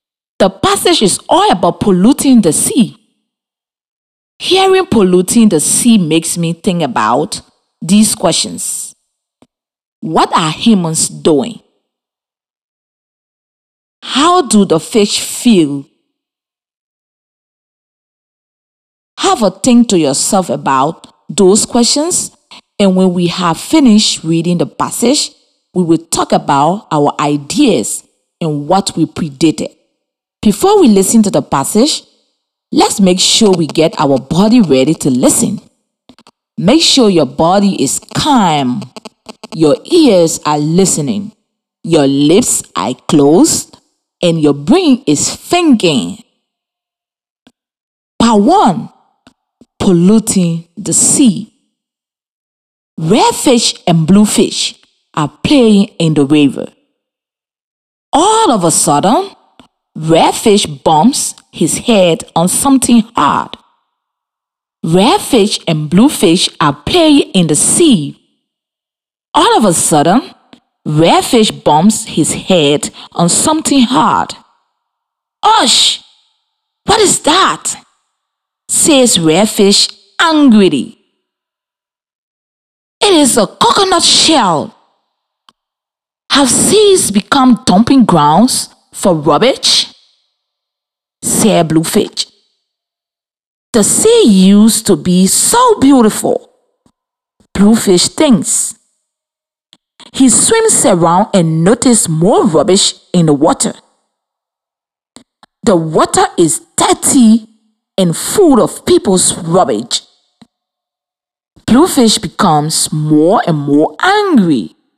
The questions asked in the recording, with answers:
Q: What are humans doing?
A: humans are dumping their rubbish into the sea instead of putting them in the bin.